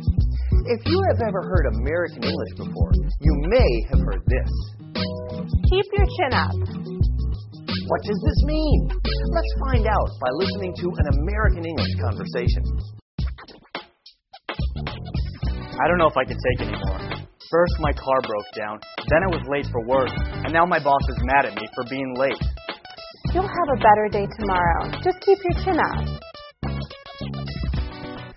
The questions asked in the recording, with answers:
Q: What does this mean?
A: Keep your chin up means to keep your spirits high and remain cheerful in a difficult situation.